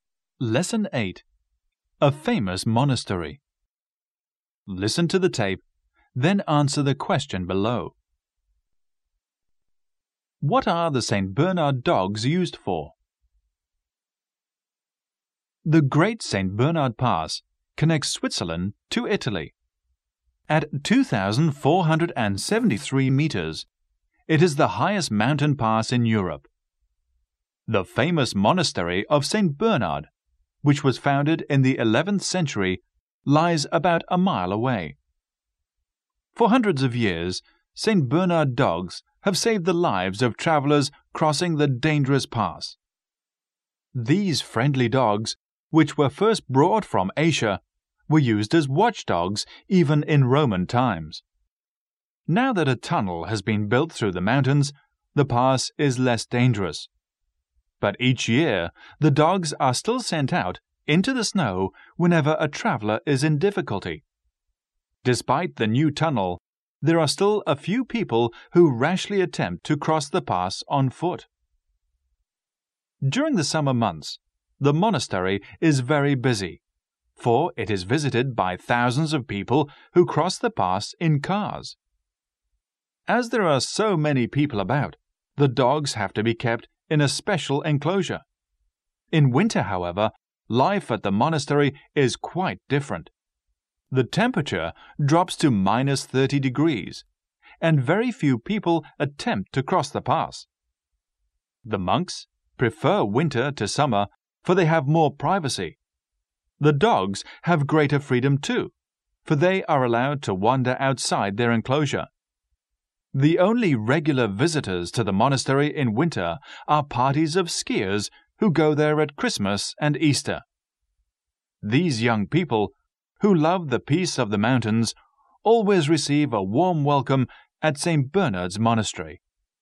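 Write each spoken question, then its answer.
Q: What are the St. Bernard dogs used for?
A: To save the lives of travelers crossing the dangerous pass (rescuing travelers in difficulty in the snow)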